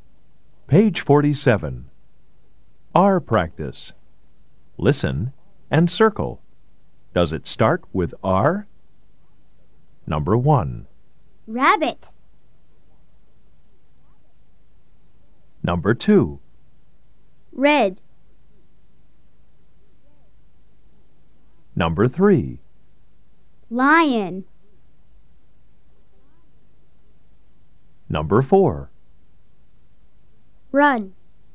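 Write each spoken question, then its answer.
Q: Rabbit.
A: Yes

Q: Lion.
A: No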